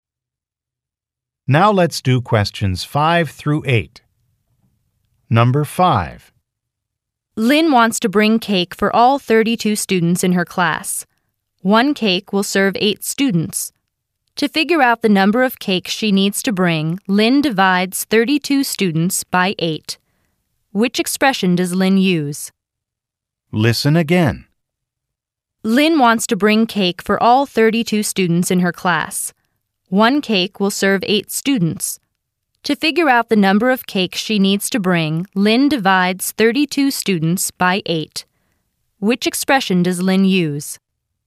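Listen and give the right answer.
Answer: 32 ÷ 8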